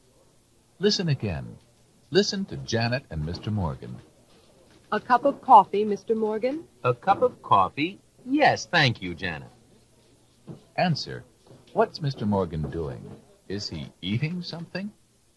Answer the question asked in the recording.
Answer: No, he's not.